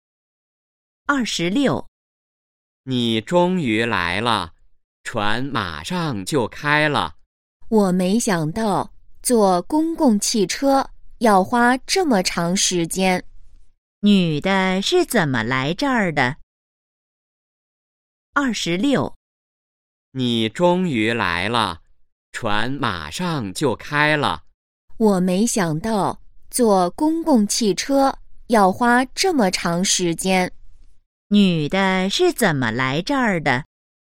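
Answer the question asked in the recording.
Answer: 坐公共汽车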